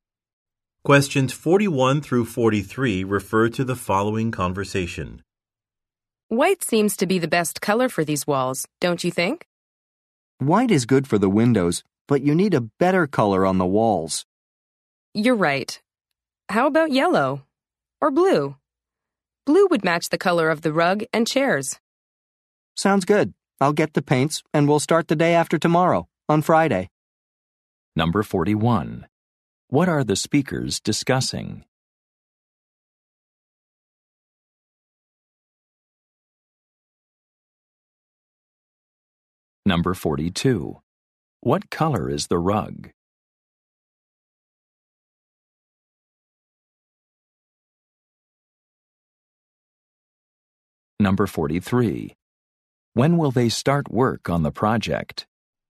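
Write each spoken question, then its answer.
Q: What are the speakers discussing?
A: Painting a room

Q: What color is the rug?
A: Blue

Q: When will they start work on the project?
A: Friday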